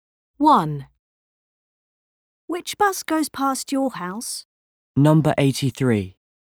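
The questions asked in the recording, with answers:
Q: Which bus goes past your house?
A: Number 83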